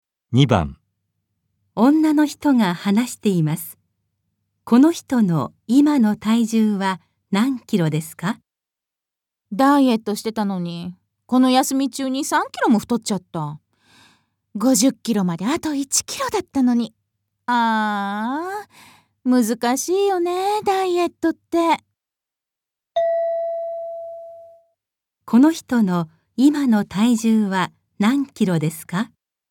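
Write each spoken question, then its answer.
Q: この人の今の体重は何キロですか?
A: 54キロ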